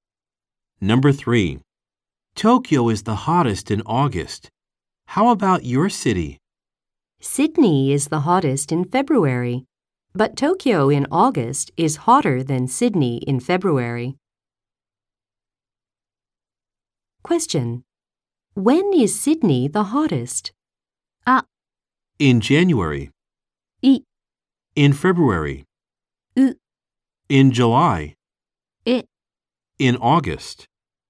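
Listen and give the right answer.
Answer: I: In February.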